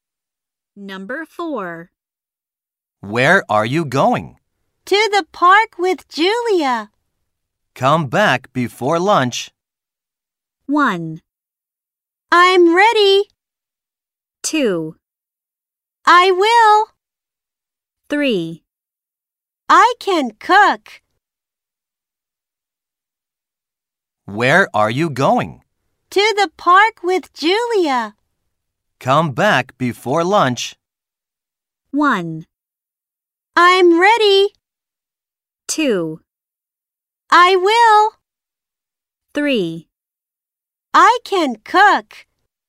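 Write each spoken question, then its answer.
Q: Come back before lunch.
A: 2: I will.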